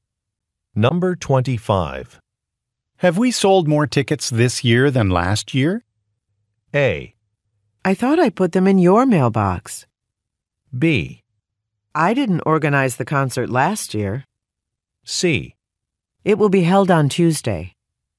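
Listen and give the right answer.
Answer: B: I didn't organize the concert last year.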